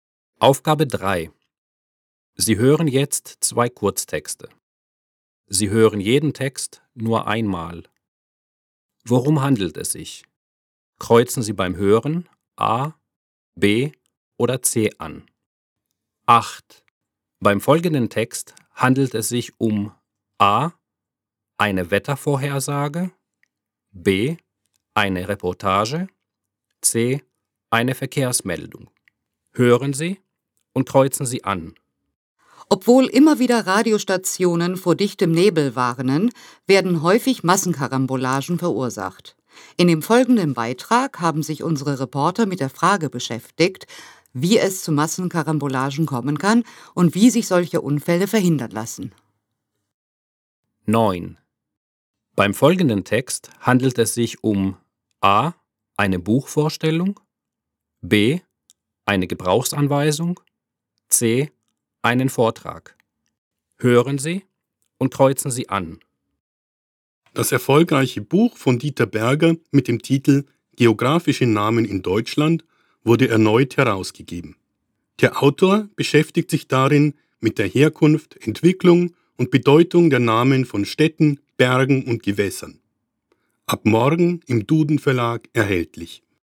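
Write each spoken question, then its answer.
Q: Beim folgenden Text handelt es sich um A.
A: B: Eine Reportage

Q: Beim folgenden Text handelt es sich um A.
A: A: eine Buchvorstellung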